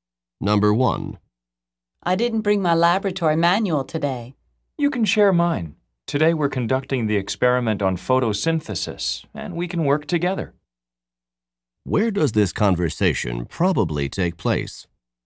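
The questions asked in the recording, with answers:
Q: Where does this conversation probably take place?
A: In a laboratory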